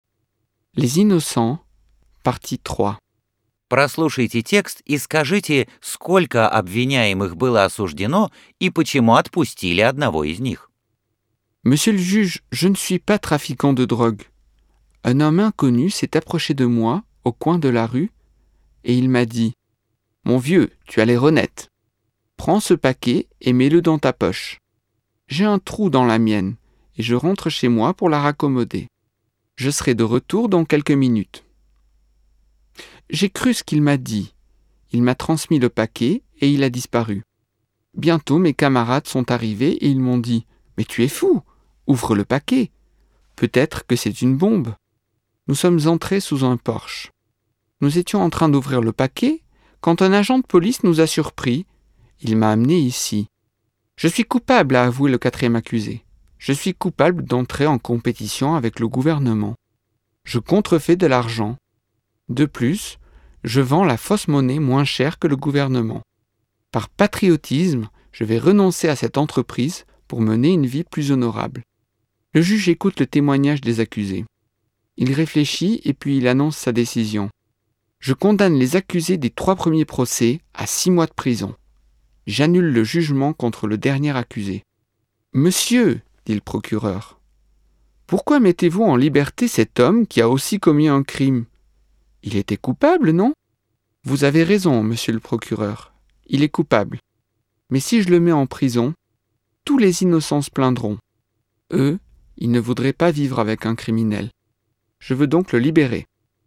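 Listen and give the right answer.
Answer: Осуждены трое обвиняемых (к 6 месяцам тюрьмы); четвёртого отпустили, потому что, если посадить его в тюрьму, невиновные будут жаловаться: они не хотят сидеть вместе с преступником.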